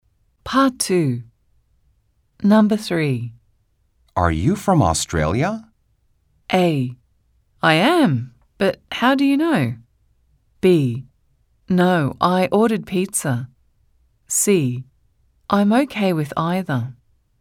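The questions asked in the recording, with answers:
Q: Are you from Australia?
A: A: I am, but how do you know?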